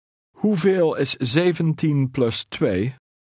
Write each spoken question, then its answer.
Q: Hoeveel is 17 plus 2?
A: 19.